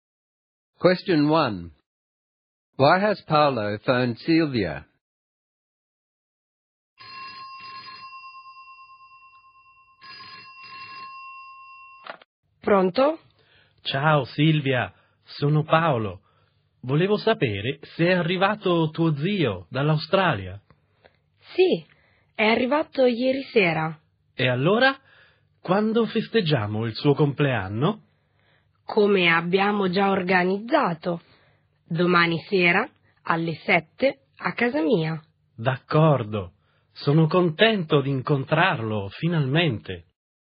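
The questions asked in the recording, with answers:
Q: Why has Paolo phoned Silvia?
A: To ask whether her uncle has arrived from Australia and to check when they are celebrating his birthday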